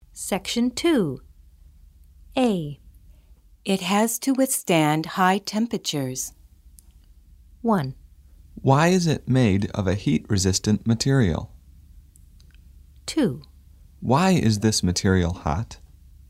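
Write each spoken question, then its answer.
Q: It has to withstand high temperatures.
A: 1: Why is it made of a heat-resistant material?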